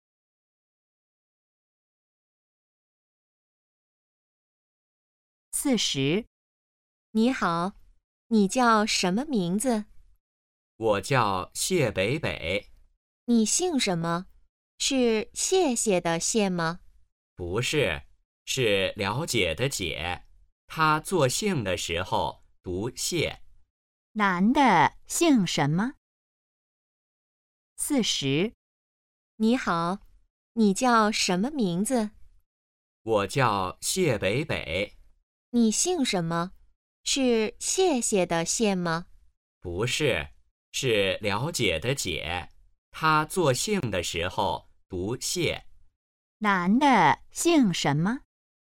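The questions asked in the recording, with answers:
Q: 男的姓什么?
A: 解(读xiè)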